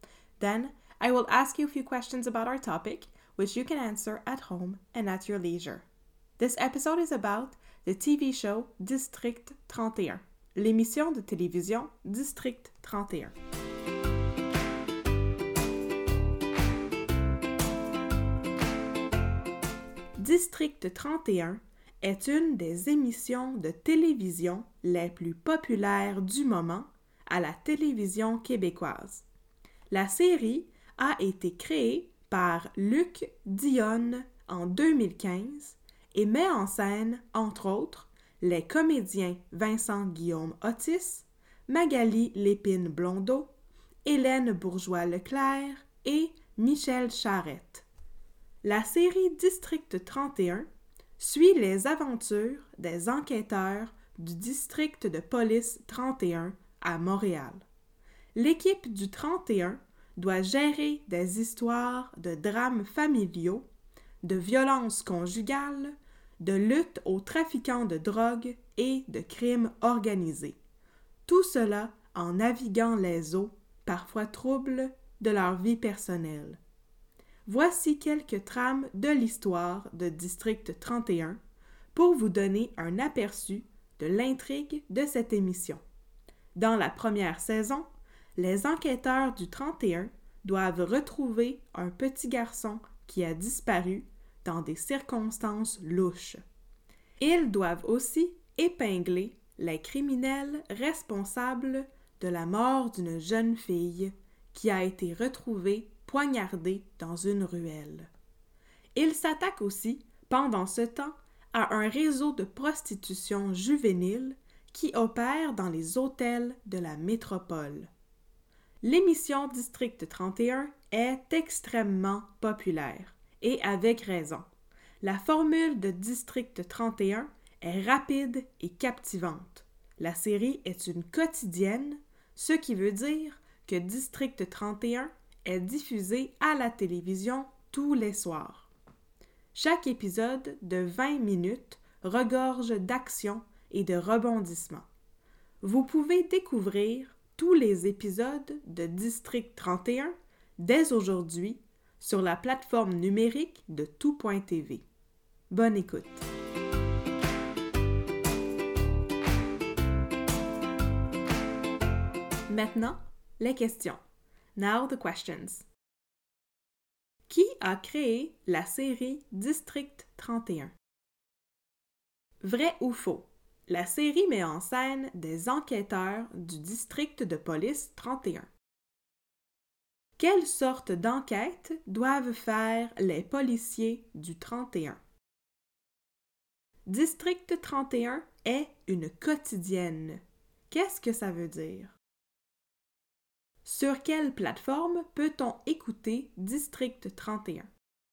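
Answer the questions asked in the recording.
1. Luc Dionne
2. Vrai
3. Drames familiaux, violences conjugales, trafic de drogue, crime organisé
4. Elle est diffusée à la télévision tous les soirs
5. tout.tv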